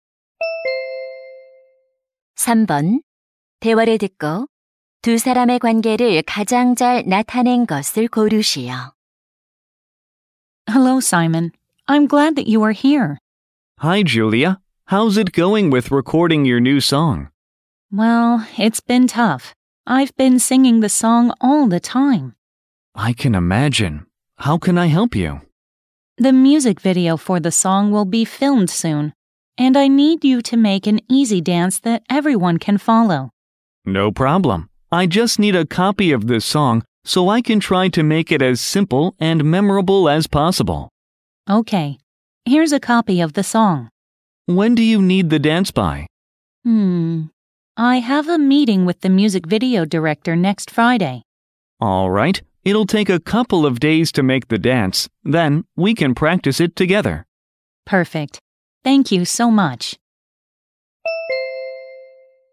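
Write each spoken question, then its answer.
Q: 대화를 듣고 두 사람의 관계를 가장 잘 나타낸 것을 고르시오.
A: 가수 - 안무가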